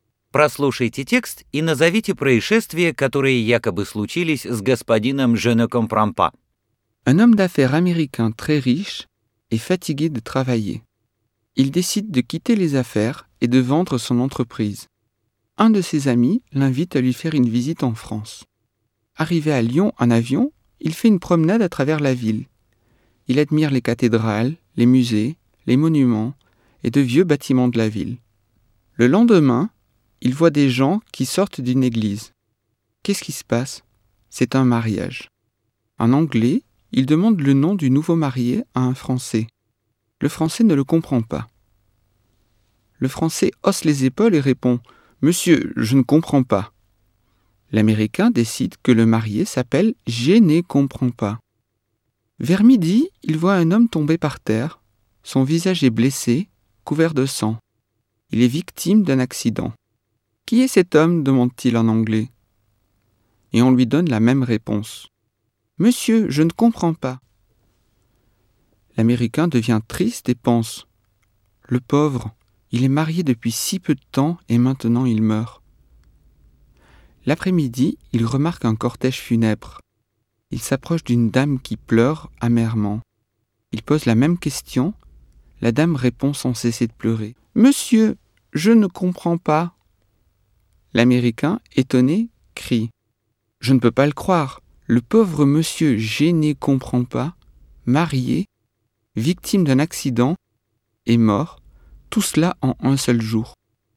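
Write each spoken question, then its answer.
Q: Прослушайте текст и назовите происшествия, которые якобы случились с господином Je ne comprends pas.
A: Он женился, попал в аварию (несчастный случай) и умер — всё за один день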